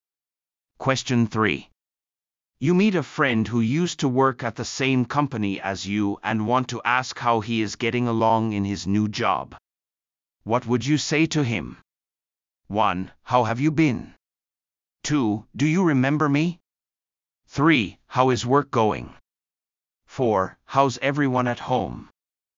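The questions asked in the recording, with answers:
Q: What would you say to him?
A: 3: How is work going?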